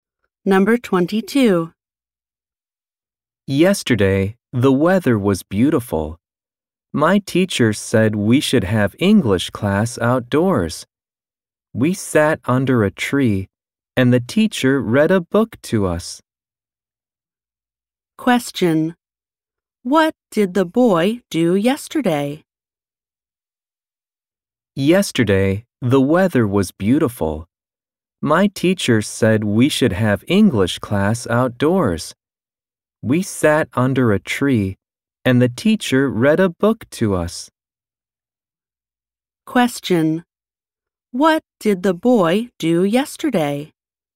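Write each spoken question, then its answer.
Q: What did the boy do yesterday?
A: He had English class outdoors under a tree while the teacher read a book to them.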